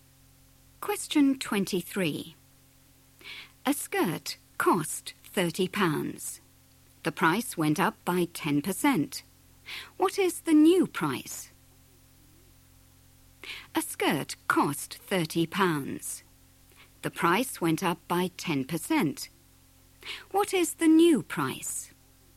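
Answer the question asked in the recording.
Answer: £33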